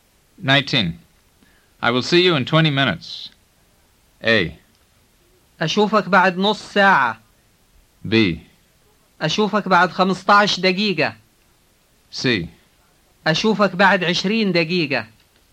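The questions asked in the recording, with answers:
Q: I will see you in 20 minutes.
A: C: أشوفك بعد 20 دقيقة.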